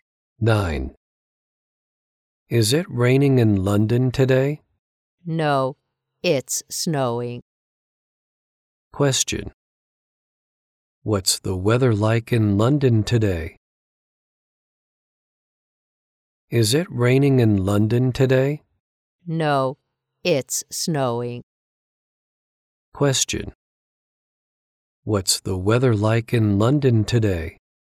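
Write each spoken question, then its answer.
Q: What's the weather like in London today?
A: It's snowing.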